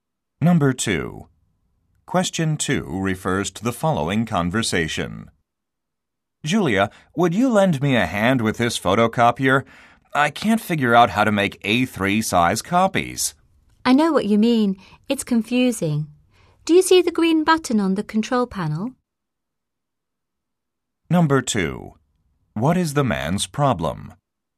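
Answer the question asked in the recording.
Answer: He can't figure out how to make A3 size copies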